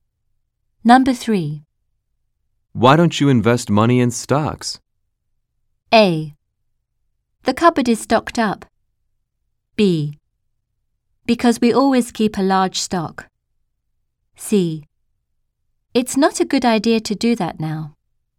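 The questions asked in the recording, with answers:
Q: Why don't you invest money in stocks?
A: C: It's not a good idea to do that now.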